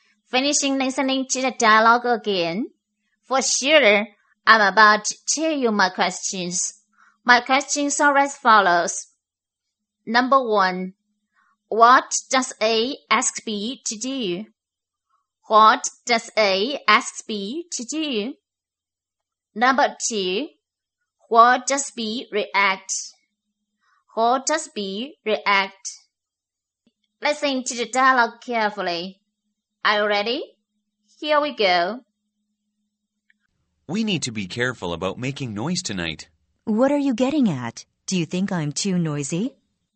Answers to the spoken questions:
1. A asks B to be more careful about making noise tonight.
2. B gets a little bit mad and says if A thinks it's too noisy.